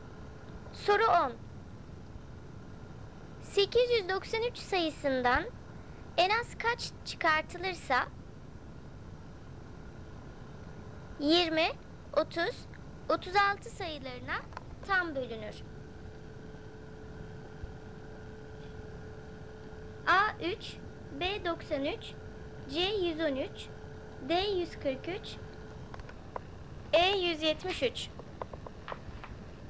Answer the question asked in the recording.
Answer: Doğru cevap E 173.